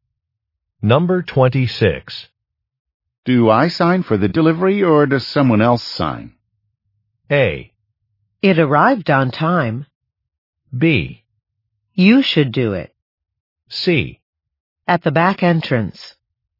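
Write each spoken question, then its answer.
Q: Do I sign for the delivery or does someone else sign?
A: B: You should do it.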